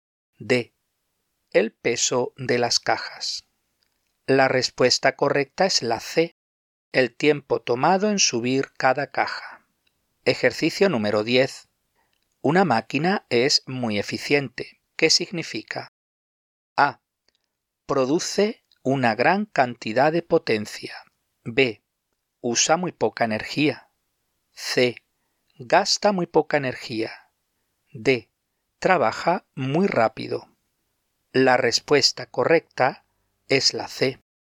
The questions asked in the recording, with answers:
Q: ¿Qué significa?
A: La respuesta correcta es la C.